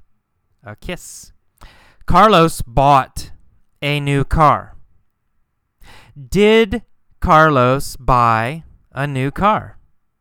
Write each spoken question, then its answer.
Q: Did Carlos buy a new car?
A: Yes. Yes, of course. He bought a new car.